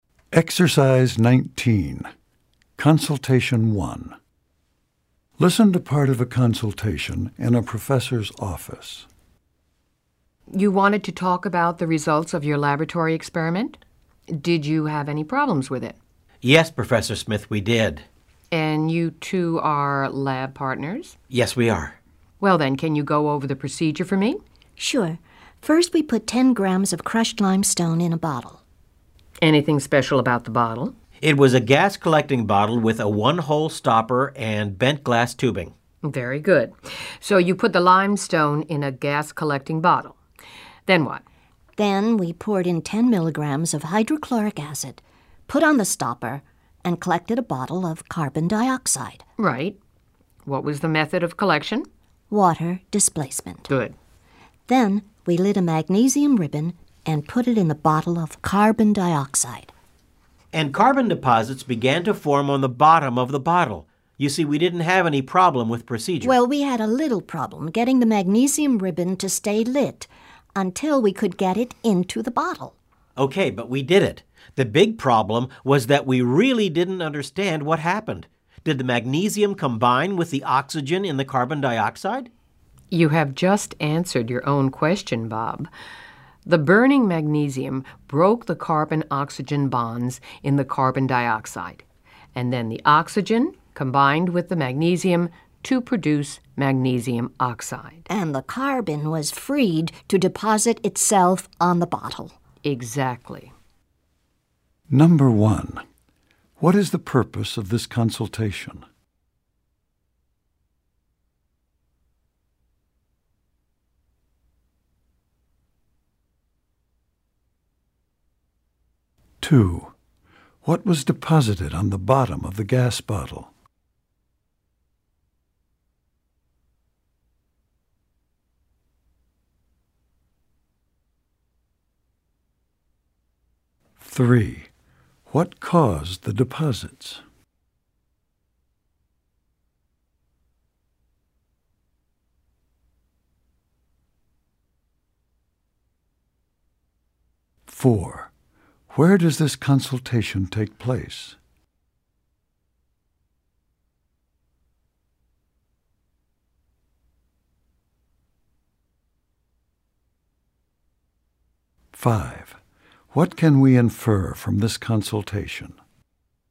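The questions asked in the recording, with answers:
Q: what is the purpose of this consultation?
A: To discuss the results of their lab experiment

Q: what was deposited on the bottom of the gas bottle?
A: Carbon

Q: what caused the deposits?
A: Burning magnesium broke the carbon-oxygen bonds in carbon dioxide

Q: where does this consultation take place?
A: In a professor's office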